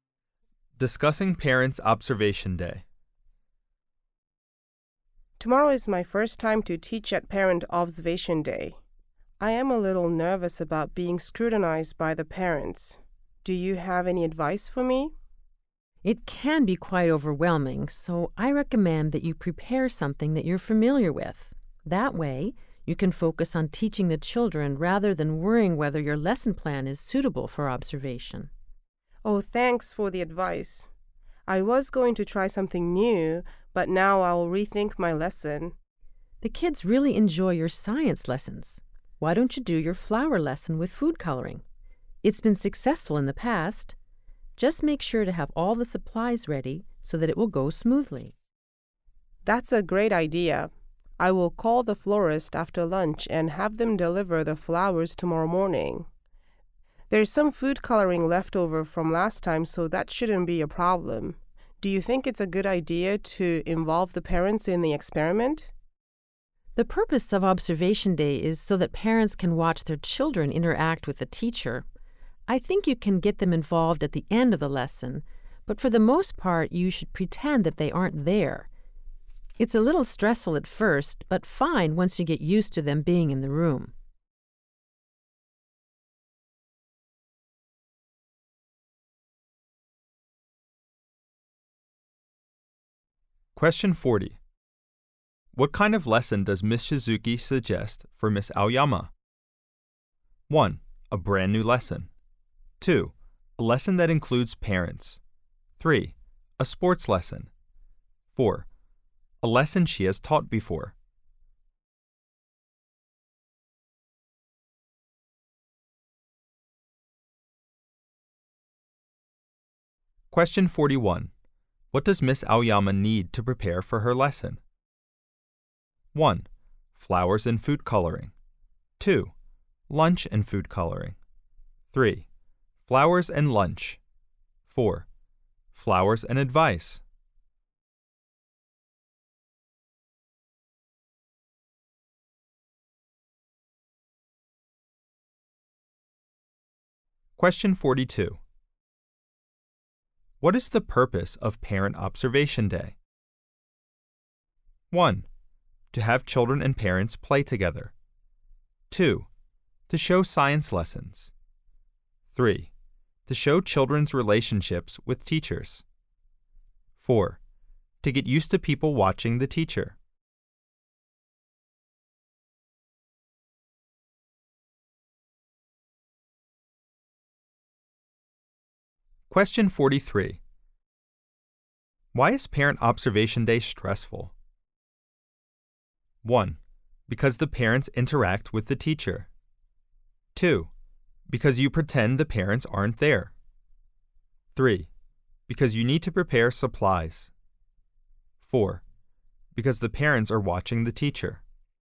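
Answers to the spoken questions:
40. 4: A lesson she has taught before.
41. 1: Flowers and food coloring.
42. 3: To show children's relationships with teachers.
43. 4: Because the parents are watching the teacher.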